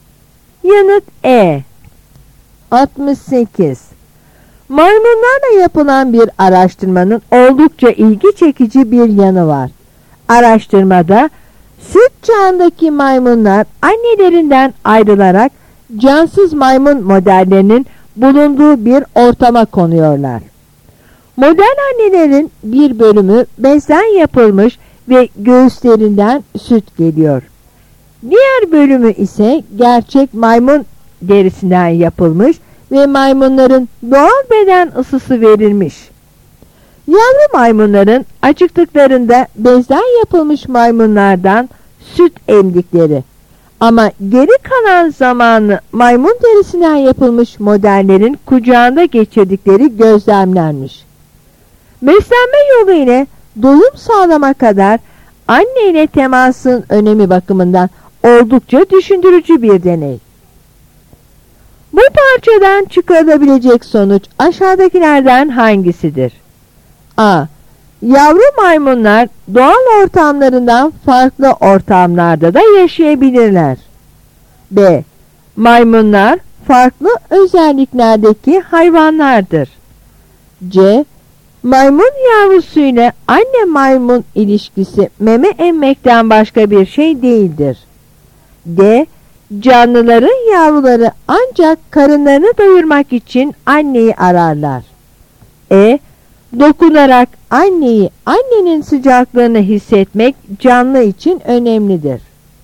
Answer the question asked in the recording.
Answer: Yanıt E.